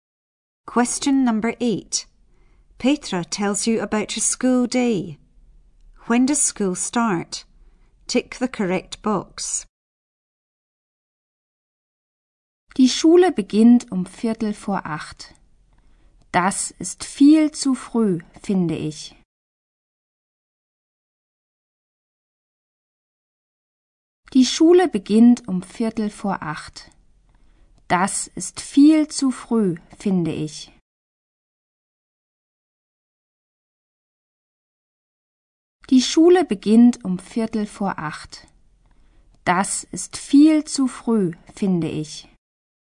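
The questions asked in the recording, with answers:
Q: When does school start? Tick the correct box.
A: 7:45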